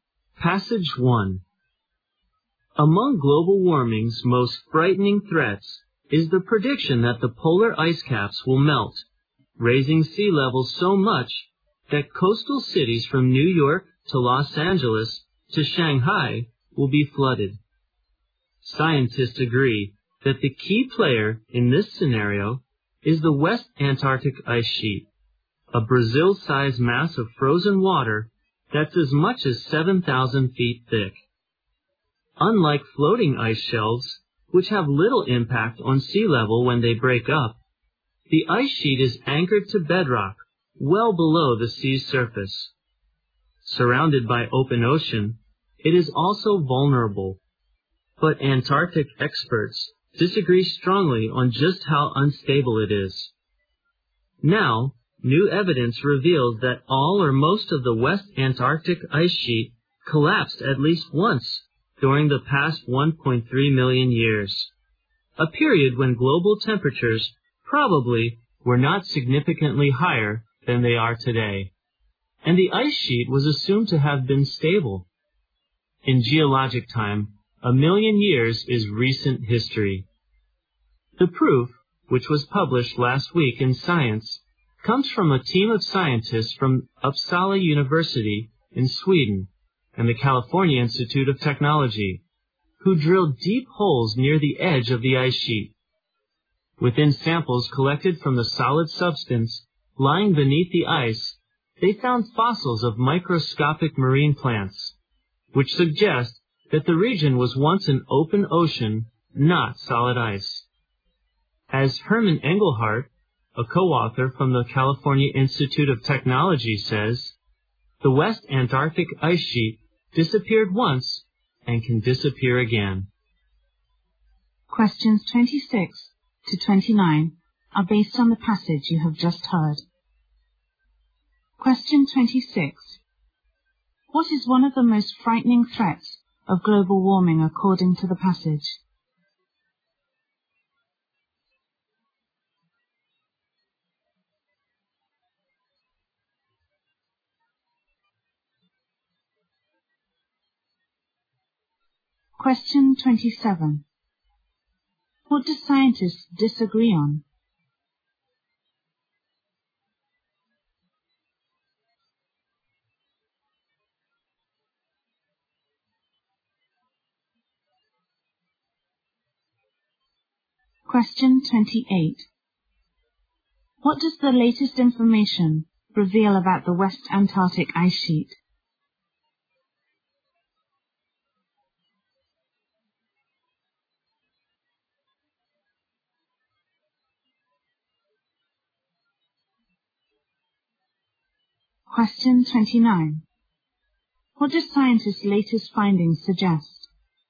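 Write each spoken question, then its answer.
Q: What is one of the most frightening threats of global warming according to the passage?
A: Polar ice caps melting and flooding coastal cities.

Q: What do scientists disagree on?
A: How unstable the West Antarctic Ice Sheet is.

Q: What does the latest information reveal about the West Antarctic ice sheet?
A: It collapsed at least once in the past 1.3 million years.

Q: What do scientists' latest findings suggest?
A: The West Antarctic ice sheet could disappear again.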